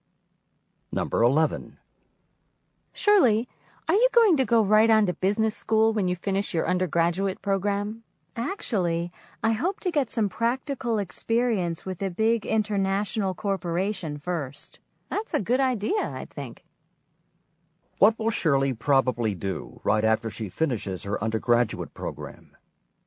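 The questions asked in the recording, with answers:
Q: What will Shirley probably do right after she finishes her undergraduate program?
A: Work for a big international corporation to get experience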